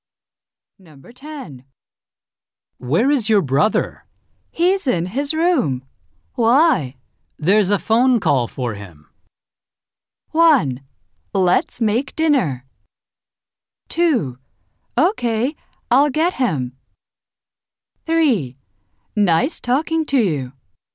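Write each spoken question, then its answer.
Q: There's a phone call for him.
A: 2: Okay, I'll get him.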